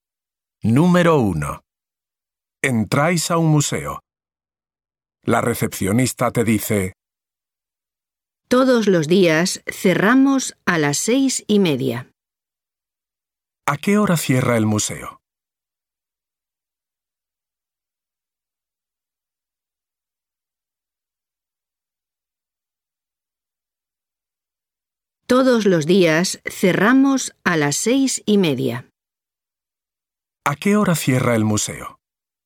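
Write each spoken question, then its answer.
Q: ¿A qué hora cierra el museo?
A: A las 6:30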